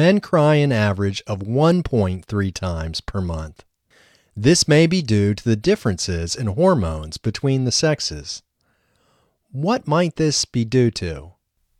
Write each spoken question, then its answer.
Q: What might this be due to?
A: This might be due to the differences in hormones between the sexes.